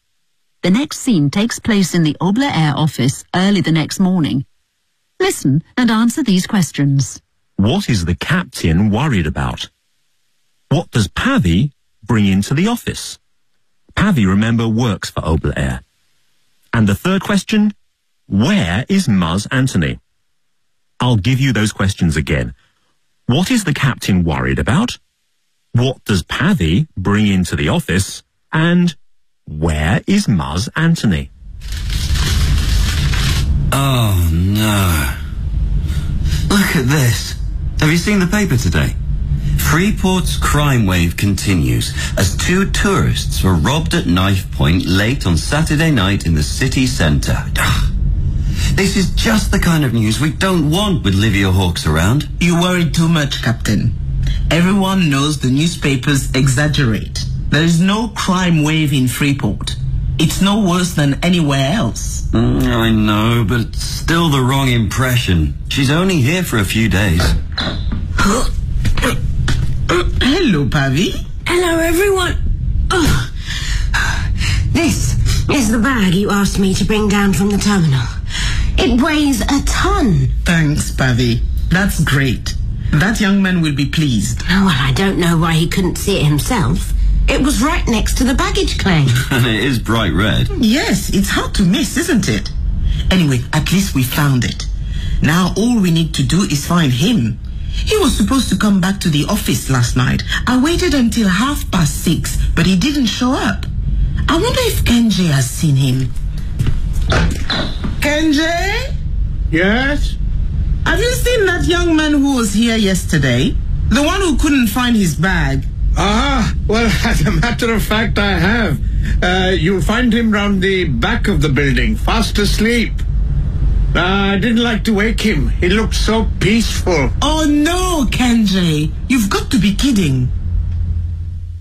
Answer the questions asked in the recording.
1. A story in the newspaper.
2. She brings Muzz's bag, the bag that he lost yesterday when he arrived in Freeport.
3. He's round the back of the building, fast asleep.